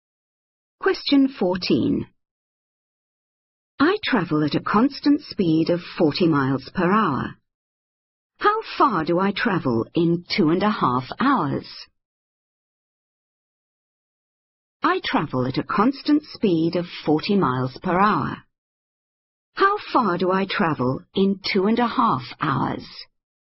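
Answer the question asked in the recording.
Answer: 100 miles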